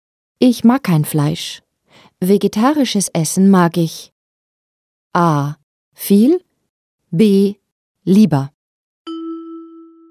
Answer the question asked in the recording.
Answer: B ist richtig. Vegetarisches Essen mag ich lieber.